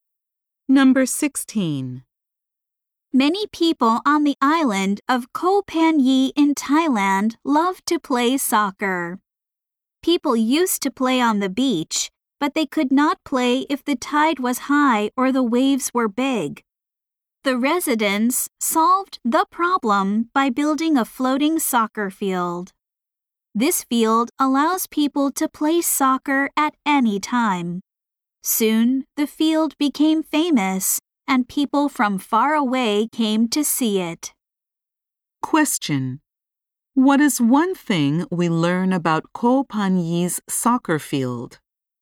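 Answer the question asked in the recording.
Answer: It floats, so people can play at any time.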